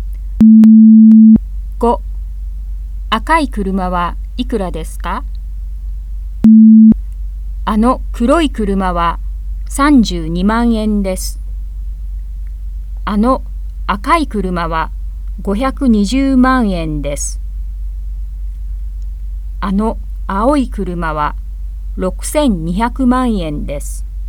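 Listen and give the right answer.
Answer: 520万円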